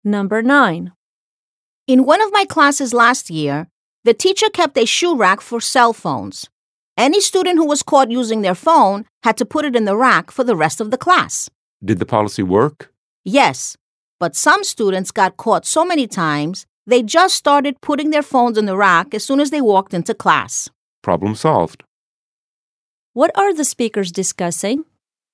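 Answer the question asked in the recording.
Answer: A teacher's policy of making students put their phones in a shoe rack during class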